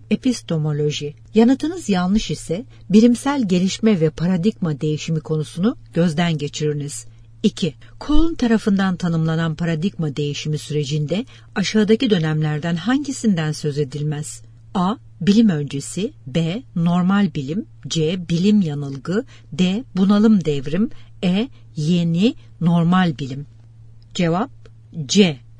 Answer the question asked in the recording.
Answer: Cevap C.